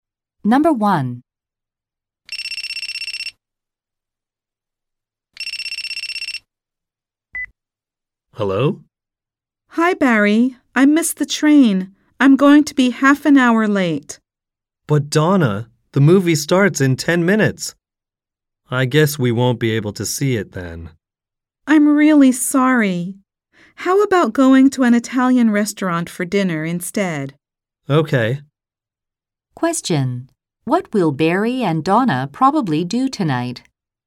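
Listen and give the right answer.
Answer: Go to an Italian restaurant for dinner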